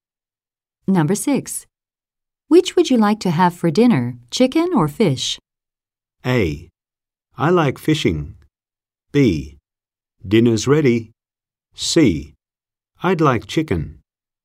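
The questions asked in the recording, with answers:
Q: Which would you like to have for dinner, chicken or fish?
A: C: I'd like chicken.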